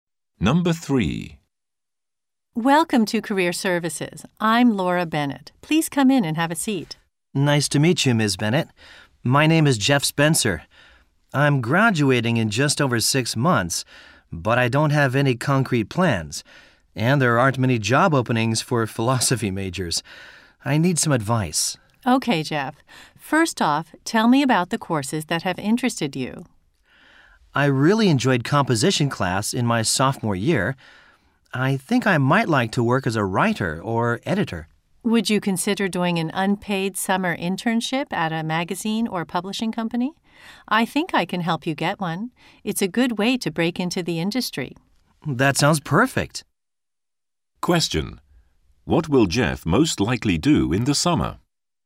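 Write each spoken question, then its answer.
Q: What will Jeff most likely do in the summer?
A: Do an unpaid internship at a magazine or publishing company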